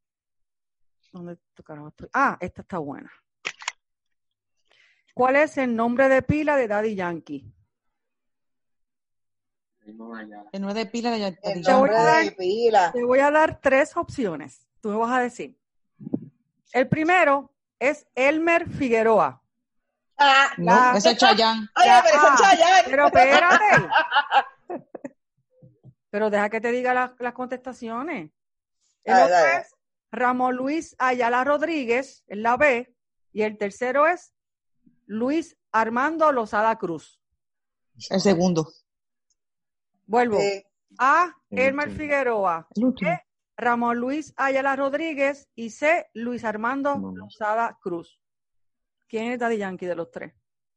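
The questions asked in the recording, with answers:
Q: ¿Cuál es el nombre de pila de Daddy Yankee?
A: B: Ramón Luis Ayala Rodríguez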